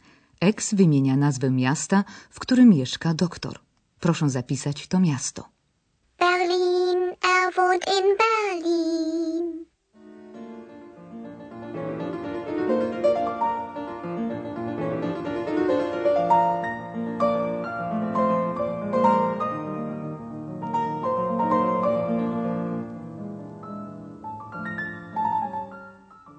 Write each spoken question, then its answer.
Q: Proszę zapisać to miasto.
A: Miasto doktora Thurmana to Berlin